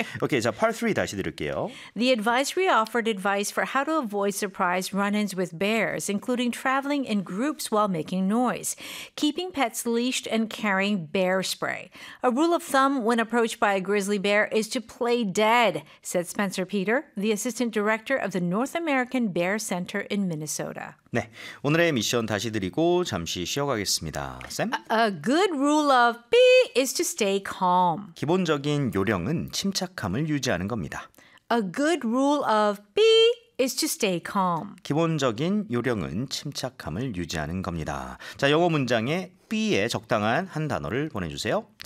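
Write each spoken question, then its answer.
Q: A good rule of B is to stay calm.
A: thumb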